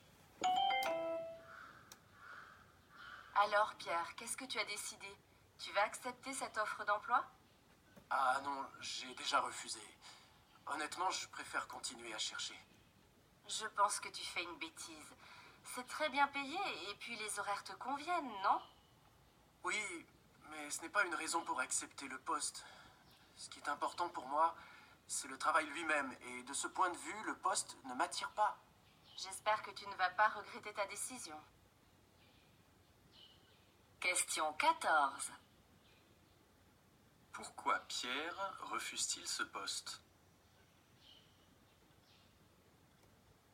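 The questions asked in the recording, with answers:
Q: Pourquoi Pierre refuse-t-il ce poste ?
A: Le travail lui-même ne l'attire pas.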